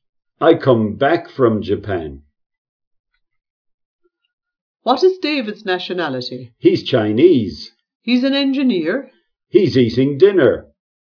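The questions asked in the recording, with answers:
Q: What is David's nationality?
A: He's Chinese.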